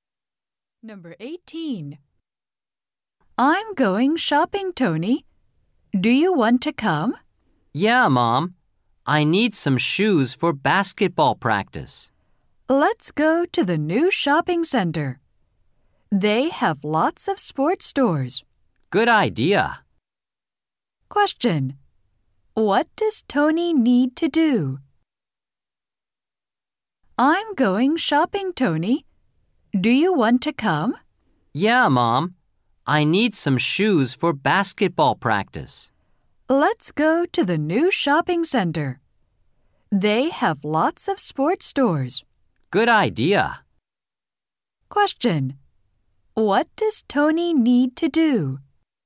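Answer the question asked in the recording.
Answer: Buy shoes for basketball practice.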